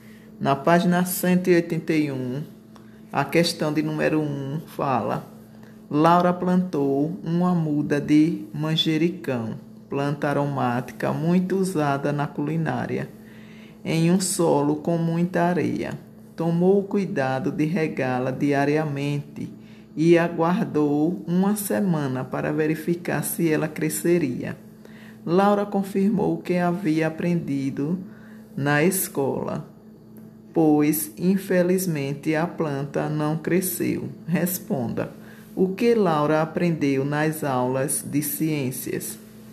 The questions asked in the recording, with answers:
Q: O que Laura aprendeu nas aulas de ciências?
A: ela aprendeu que o solo com muita areia não é indicado para plantações.